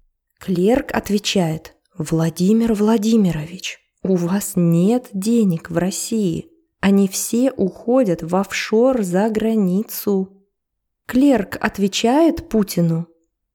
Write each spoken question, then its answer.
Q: Клерк отвечает Путину?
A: Да, конечно, он ему отвечает.